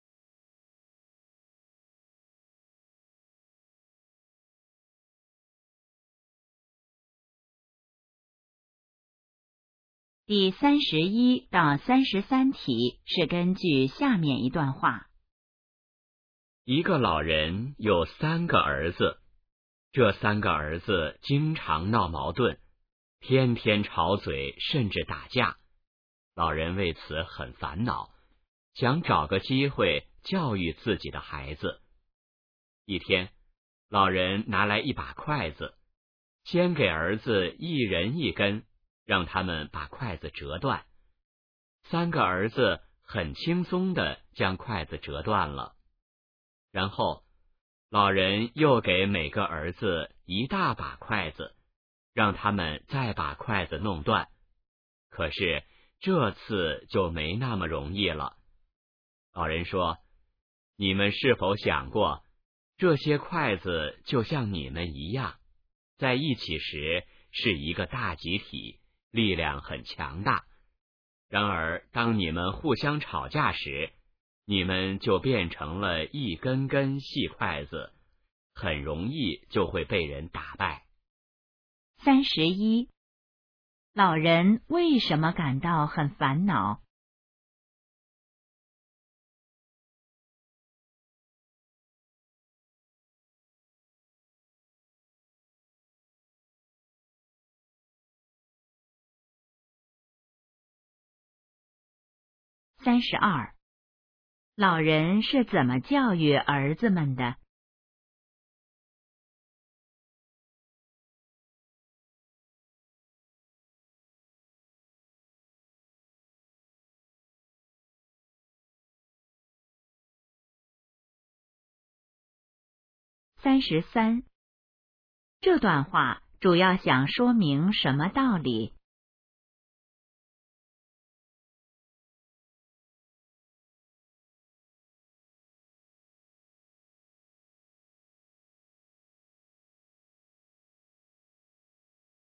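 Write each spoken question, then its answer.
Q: 老人为什么感到很烦恼?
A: 三个儿子经常闹矛盾

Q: 老人是怎么教育儿子们的?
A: 让他们折筷子

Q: 这段话主要想说明什么道理?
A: 团结力量大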